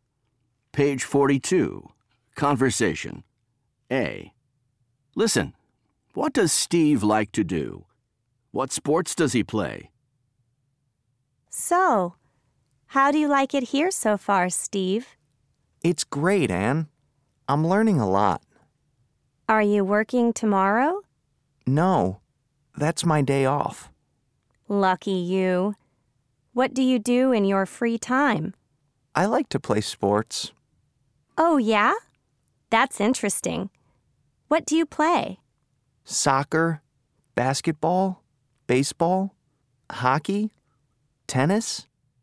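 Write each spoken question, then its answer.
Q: what does Steve like to do?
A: play sports

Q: What sports does he play?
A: soccer, basketball, baseball, hockey, tennis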